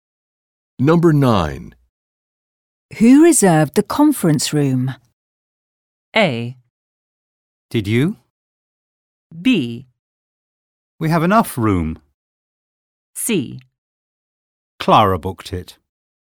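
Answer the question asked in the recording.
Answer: C: Clara booked it.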